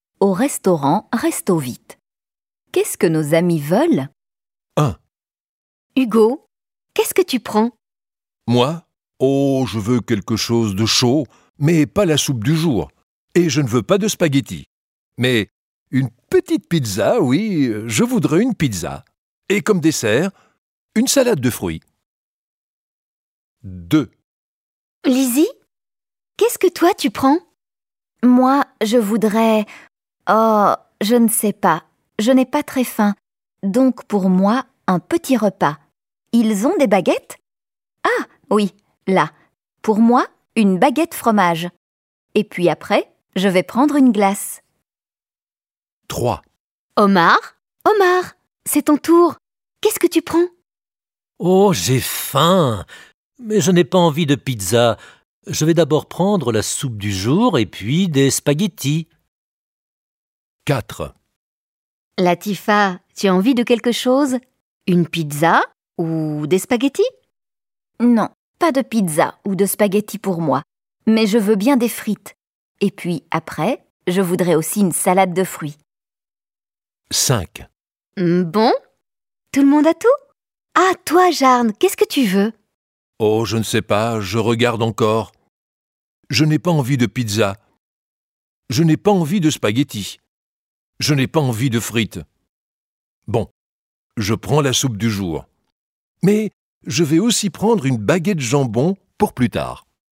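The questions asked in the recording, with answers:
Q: Hugo, qu'est-ce que tu prends ?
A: une pizza et une salade de fruits

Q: Lizzie, qu'est-ce que toi tu prends ?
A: une baguette fromage et une glace

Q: Omar, c'est ton tour. Qu'est-ce que tu prends ?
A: la soupe du jour et des spaghettis

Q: Latifa, tu as envie de quelque chose ?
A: des frites et une salade de fruits

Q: Ah, toi, Jarne, qu'est-ce que tu veux ?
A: la soupe du jour et une baguette jambon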